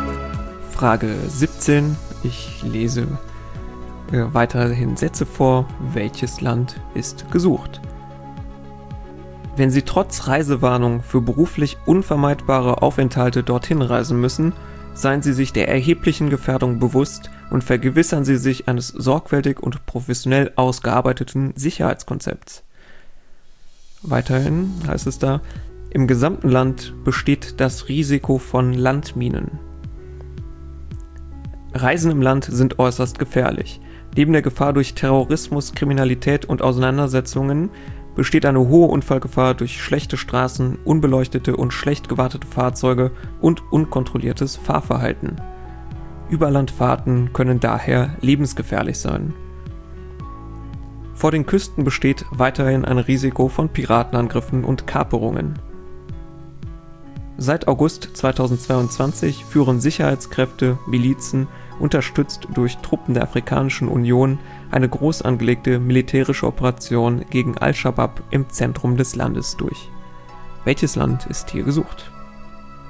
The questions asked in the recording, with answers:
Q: Welches Land ist hier gesucht?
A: Es ging um Somalia.